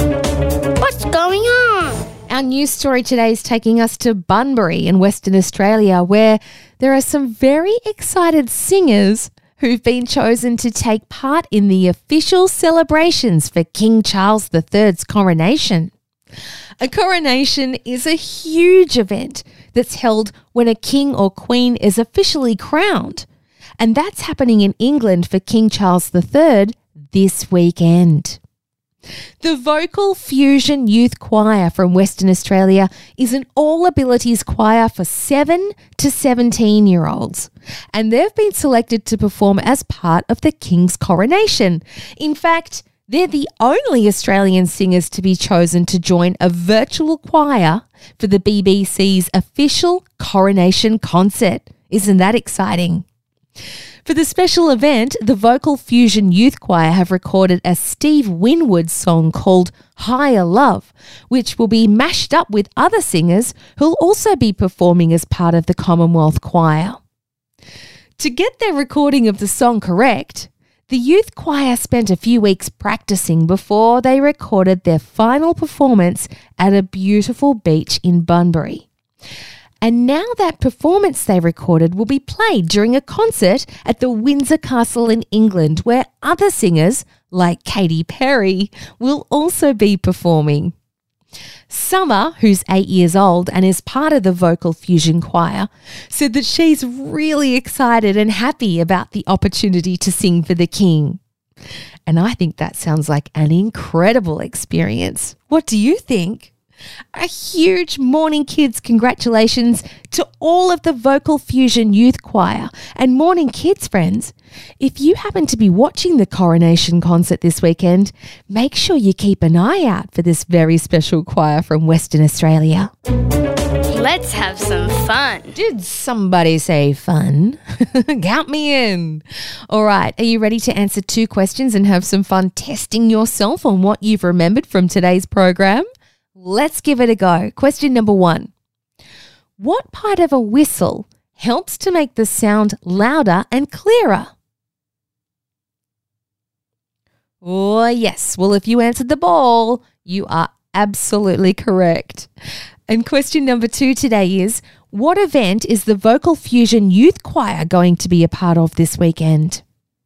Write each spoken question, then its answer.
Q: what event is the Vocal Fusion Youth Choir going to be a part of this weekend?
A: Well, if you said the Coronation concert or King Charles's coronation or anything similar to that, then you've got it right.